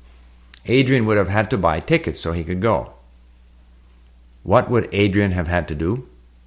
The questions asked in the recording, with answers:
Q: What would Adrian have had to do?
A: He would have had to buy tickets so he could go.